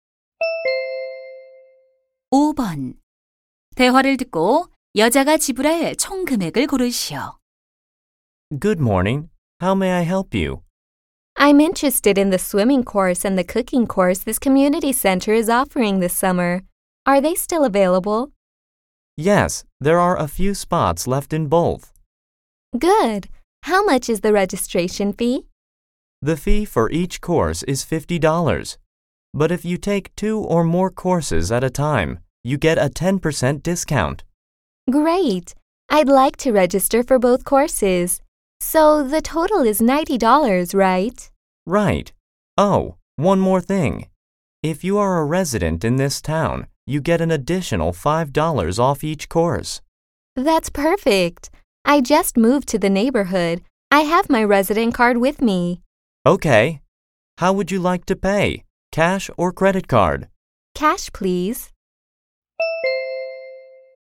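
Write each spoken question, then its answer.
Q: 대화를 듣고 여자가 지불할 총 금액을 고르시오.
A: 80달러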